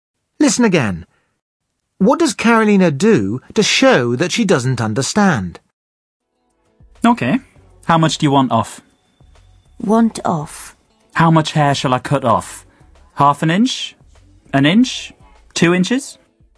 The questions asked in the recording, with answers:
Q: What does Carolina do to show that she doesn't understand?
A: She just repeats the words that she doesn't understand as a question.